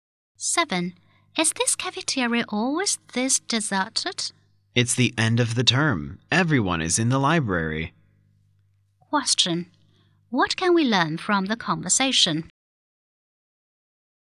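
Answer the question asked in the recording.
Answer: The cafeteria is empty because students are studying in the library at the end of term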